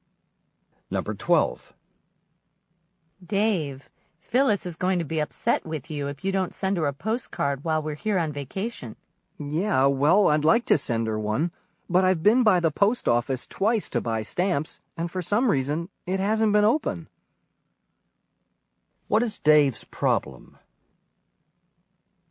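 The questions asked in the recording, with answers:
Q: What is Dave's problem?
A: He can't buy stamps because the post office has been closed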